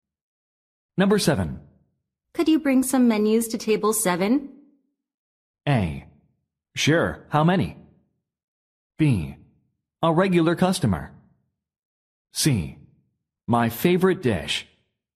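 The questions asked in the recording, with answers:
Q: Could you bring some menus to table 7?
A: A: Sure, how many?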